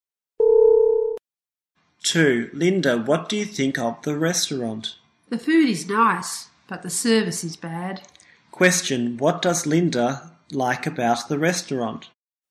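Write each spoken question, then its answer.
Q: What does Linda like about the restaurant?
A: The food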